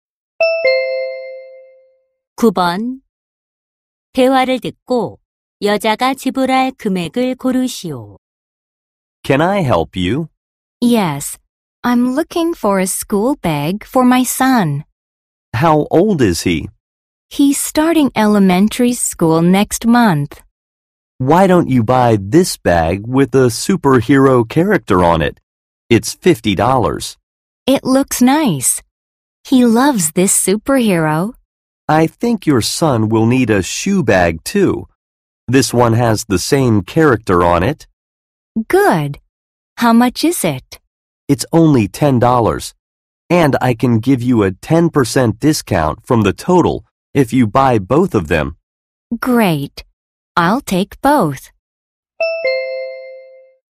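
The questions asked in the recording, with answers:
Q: 대화를 듣고 여자가 지불할 금액을 고르시오.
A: $54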